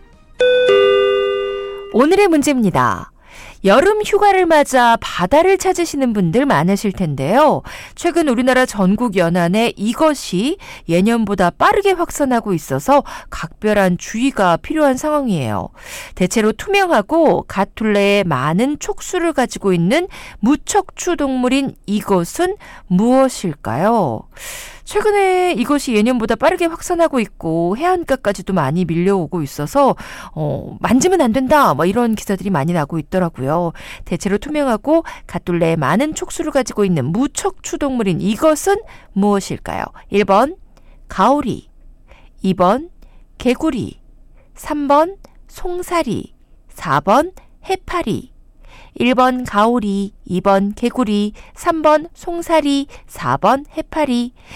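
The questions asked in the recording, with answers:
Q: 대체로 투명하고 갓둘레에 많은 촉수를 가지고 있는 무척추 동물인 이것은 무엇일까요?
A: 4: 해파리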